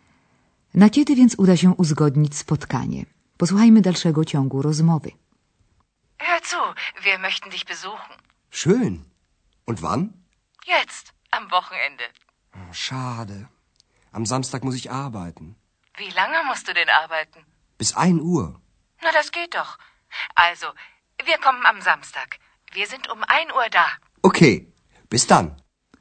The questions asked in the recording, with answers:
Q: Na kiedy więc uda się uzgodnić spotkanie?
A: Okazuje się, że w sobotę Andreas pracuje tylko do południa.